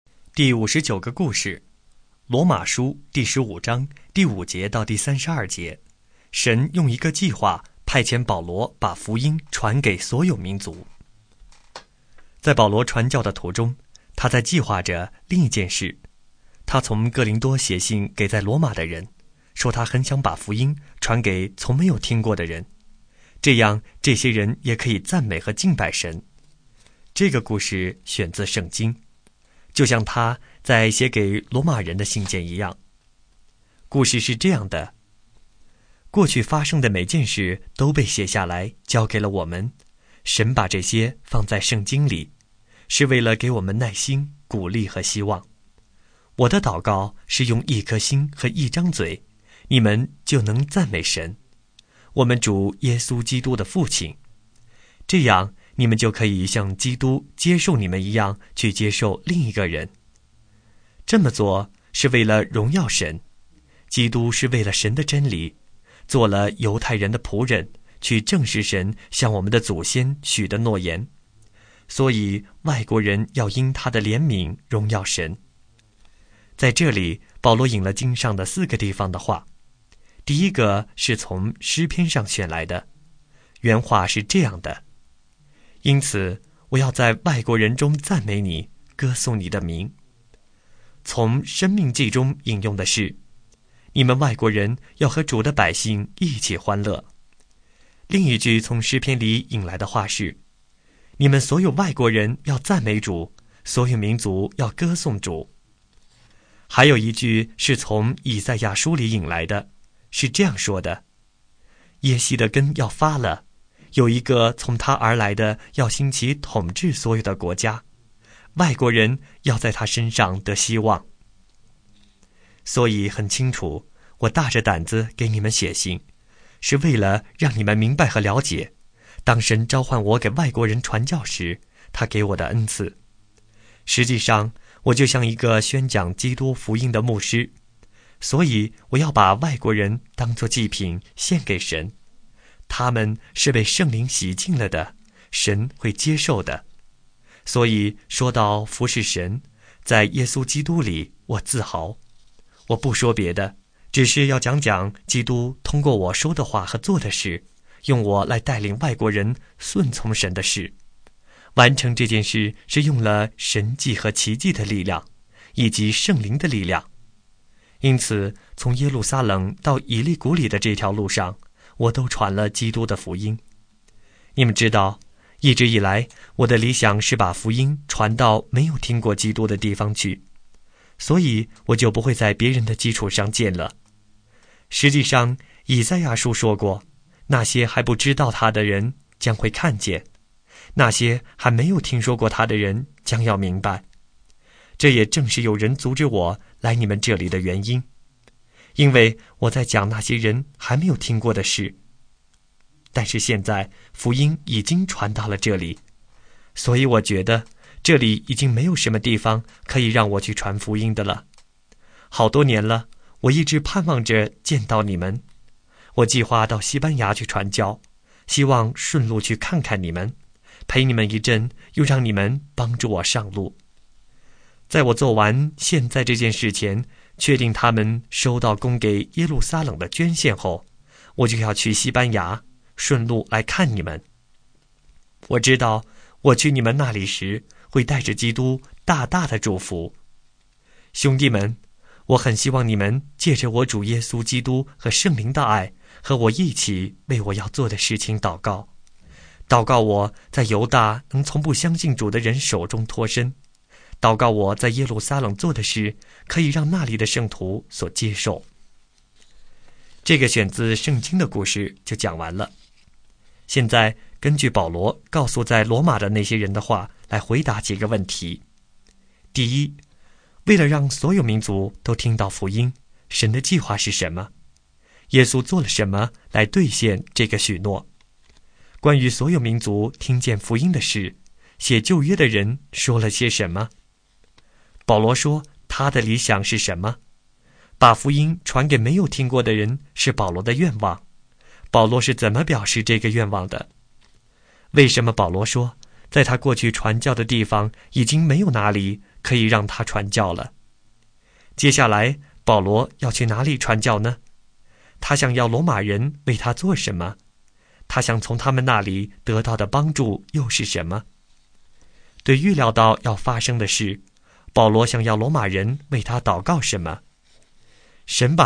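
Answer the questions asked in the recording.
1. 把福音传到没有听过基督的地方去
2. 因为福音已经传到了那里
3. 西班牙
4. 祷告他在犹大能从不相信主的人手中脱身,在耶路撒冷做的事能被圣徒接受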